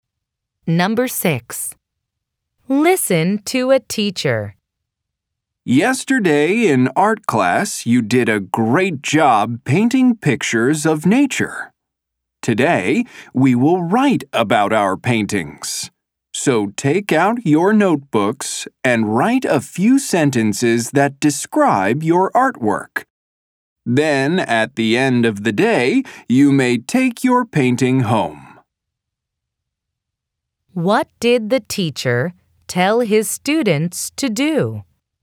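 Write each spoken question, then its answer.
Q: What did the teacher tell his students to do?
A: Write a few sentences describing their paintings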